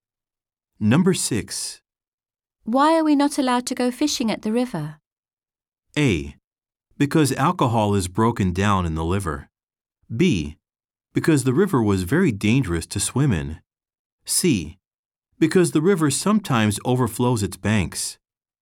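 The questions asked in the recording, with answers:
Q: Why are we not allowed to go fishing at the river?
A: C: Because the river sometimes overflows its banks.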